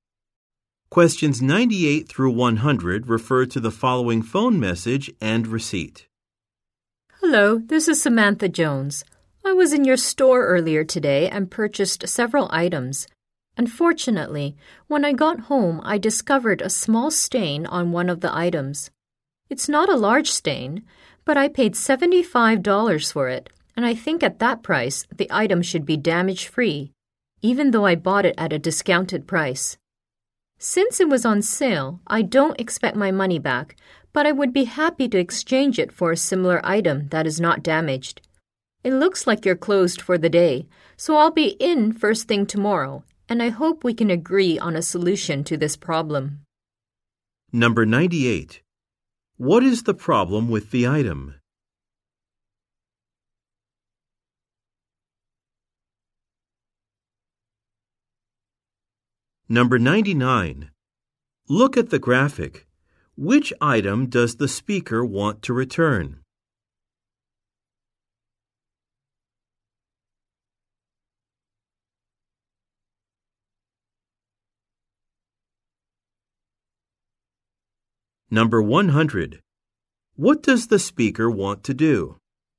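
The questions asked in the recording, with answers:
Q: What is the problem with the item?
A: It has a small stain

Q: What does the speaker want to do?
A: Exchange the item for a similar undamaged one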